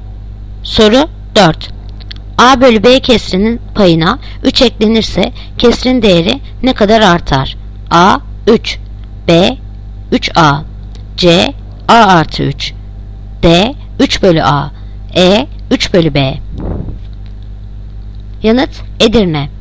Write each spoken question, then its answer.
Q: A bölü B kesrinin payına 3 eklenirse kesrin değeri ne kadar artar?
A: Yanıt Edirne. 3/B.